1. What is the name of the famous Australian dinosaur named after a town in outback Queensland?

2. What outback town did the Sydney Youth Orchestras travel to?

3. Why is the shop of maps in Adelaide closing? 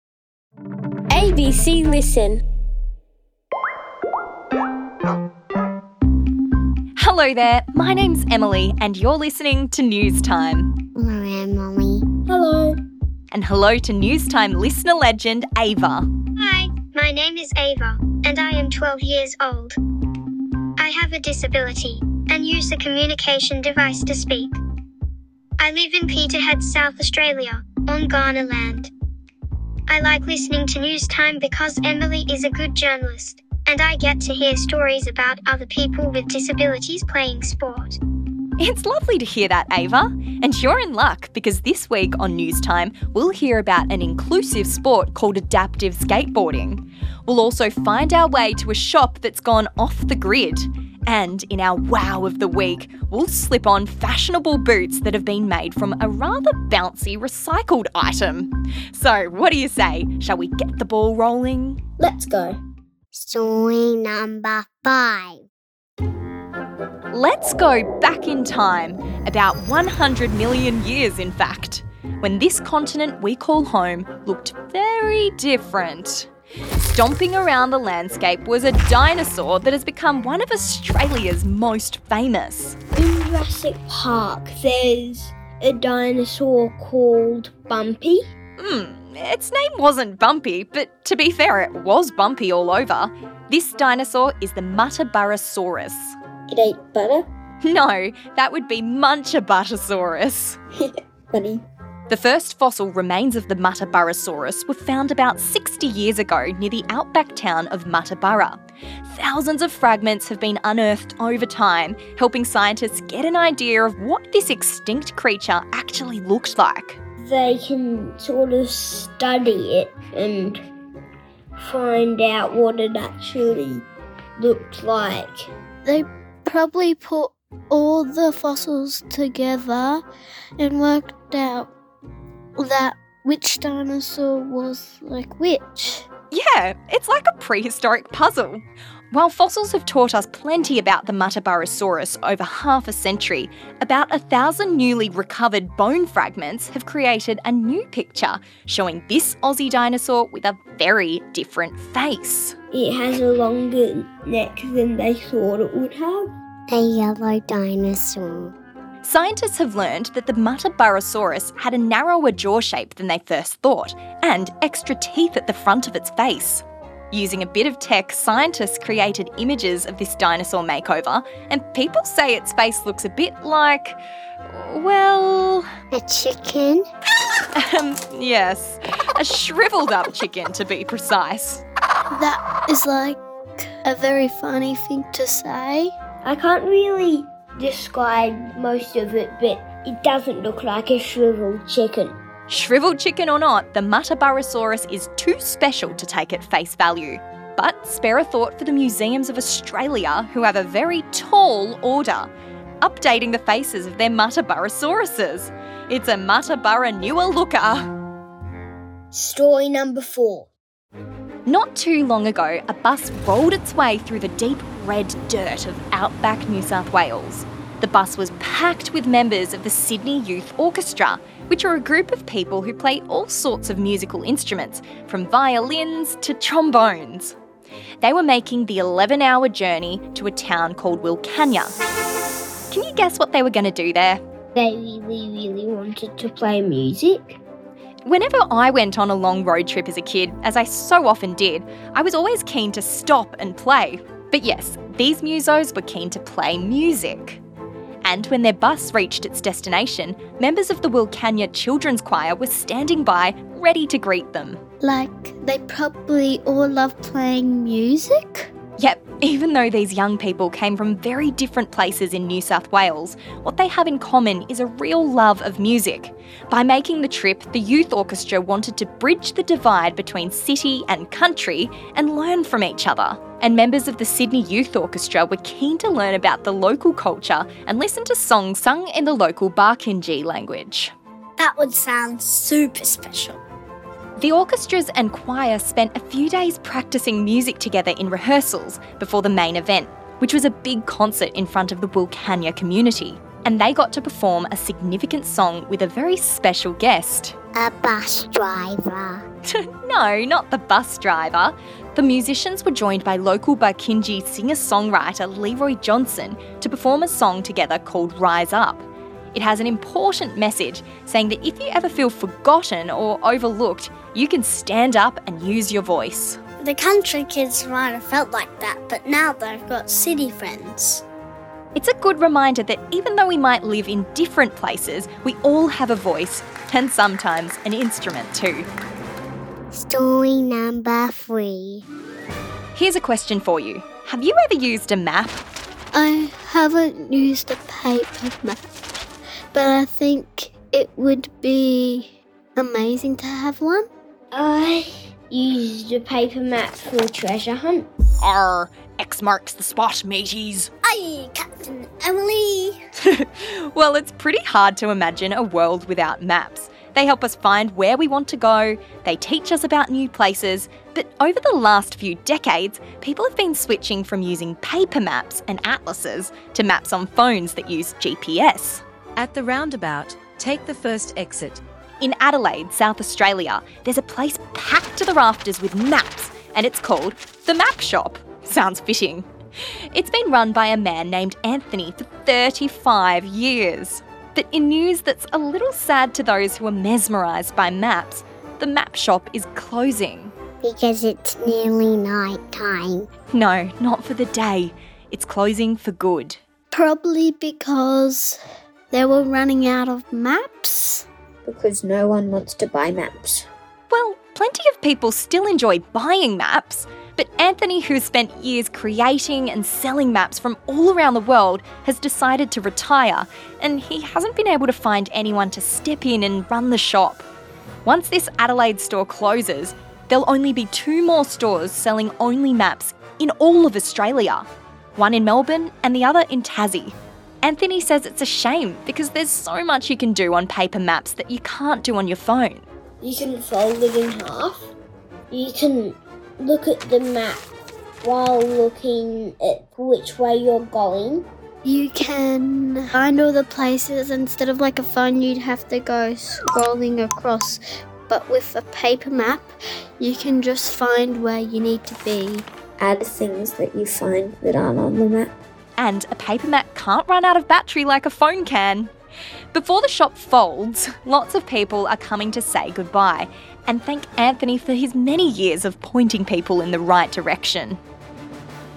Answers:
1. The muttaburrasaurus
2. Wilcannia
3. Shop owner Anthony is retiring